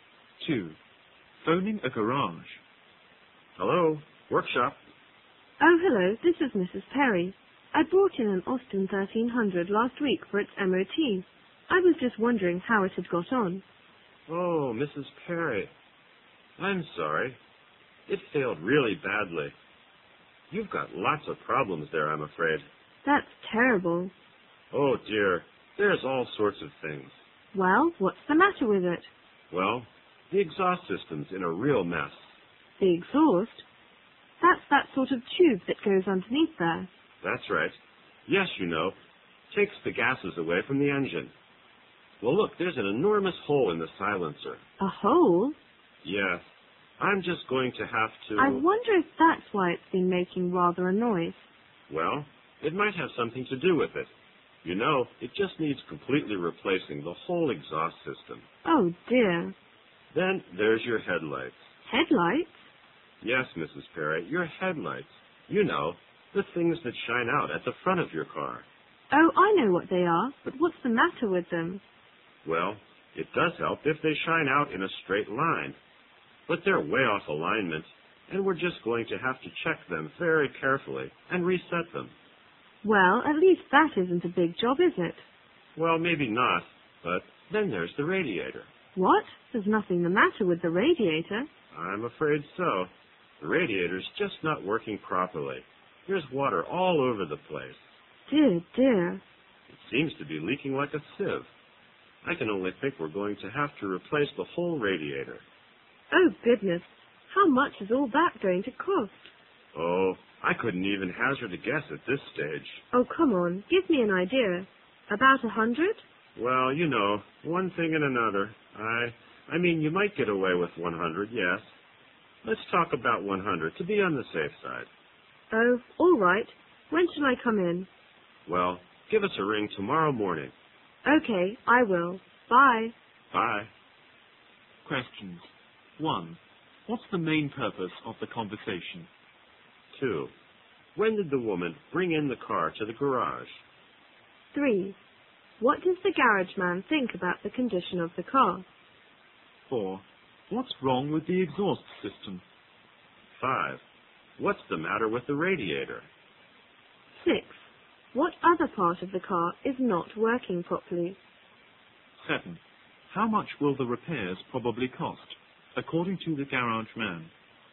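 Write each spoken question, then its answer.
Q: What's the main purpose of the conversation?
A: To find out how her car did in its MOT test

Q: When did the woman bring in the car to the garage?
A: Last week

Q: What does the garage man think about the condition of the car?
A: It is very bad; it failed badly and has lots of problems

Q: What's wrong with the exhaust system?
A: There is an enormous hole in the silencer

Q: What's the matter with the radiator?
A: It is leaking and not working properly

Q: What other part of the car is not working properly?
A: The headlights, which are out of alignment

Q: How much will the repairs probably cost, according to the garage man?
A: About 100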